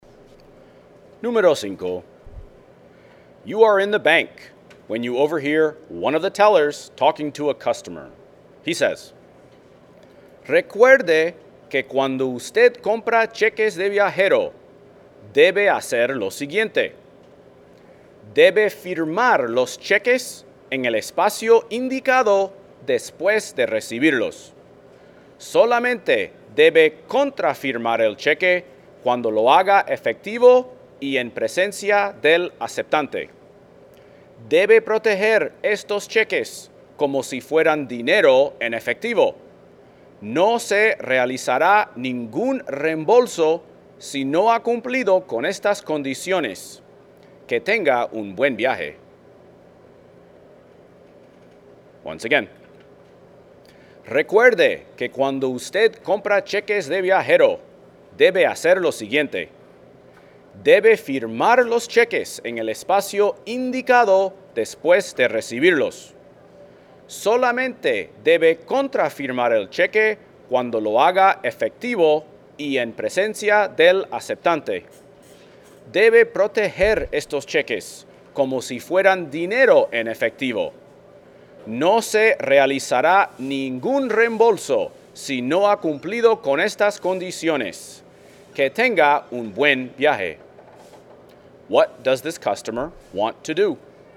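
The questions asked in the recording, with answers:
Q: What does this customer want to do?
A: Buy traveler's checks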